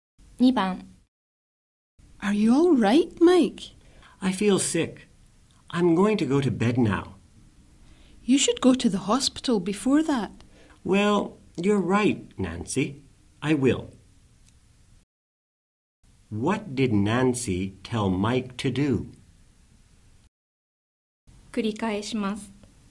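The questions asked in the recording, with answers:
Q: What did Nancy tell Mike to do?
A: To go to the hospital.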